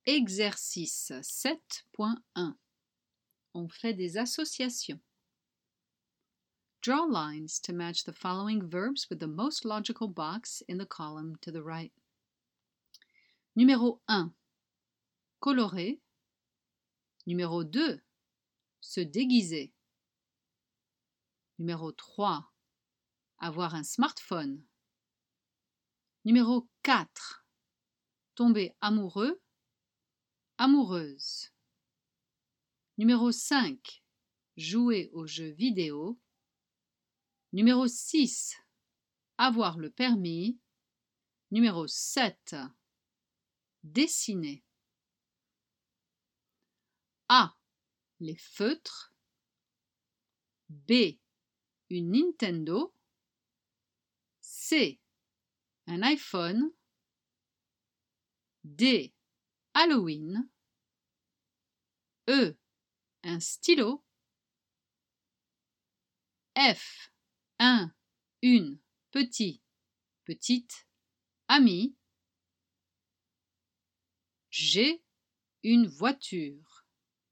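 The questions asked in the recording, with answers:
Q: Se déguiser.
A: D: Halloween

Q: Avoir un smartphone.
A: C: Un iPhone

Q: Tomber amoureux.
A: F: Une, petit, petite, ami

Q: Jouer aux jeux vidéo.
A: B: Une Nintendo

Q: Avoir le permis.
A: G: Une voiture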